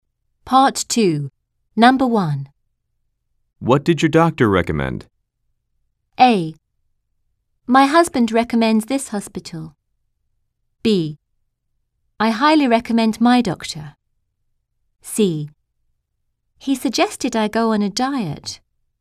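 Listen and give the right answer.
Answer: C: He suggested I go on a diet.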